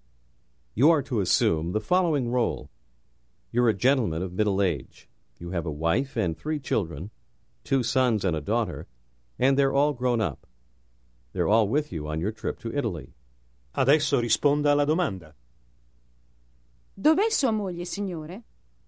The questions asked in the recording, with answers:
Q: Dov'è sua moglie, signore?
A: È qui. Mia moglie è qui in Italia con me.